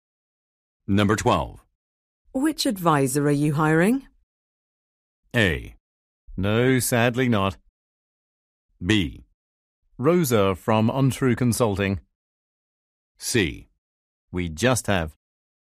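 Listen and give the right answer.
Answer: B: Rosa from Untrue Consulting.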